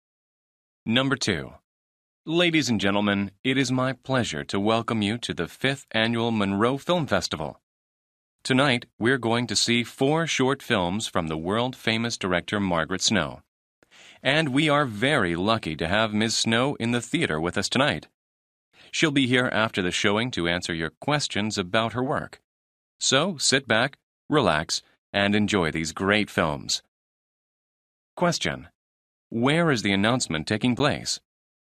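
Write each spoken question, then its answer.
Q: Where is the announcement taking place?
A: At a film festival theater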